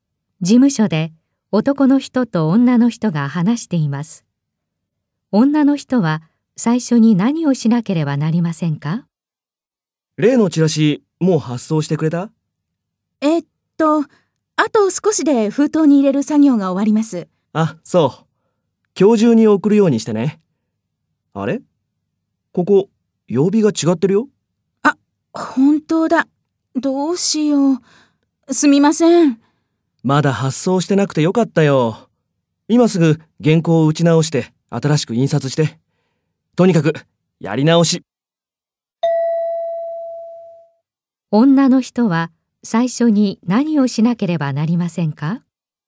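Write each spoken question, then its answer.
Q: 女の人は最初に何をしなければなりませんか?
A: 原稿を打ち直す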